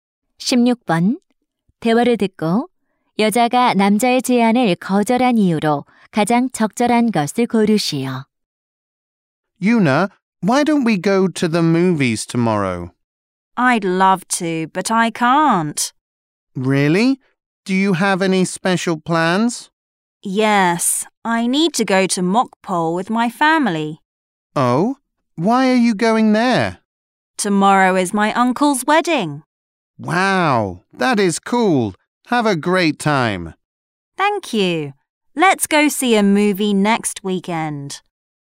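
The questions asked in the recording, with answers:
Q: 대화를 듣고 여자가 남자의 제안을 거절한 이유로 가장 적절한 것을 고르시오.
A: 삼촌의 결혼식 때문에 목포에 가야 해서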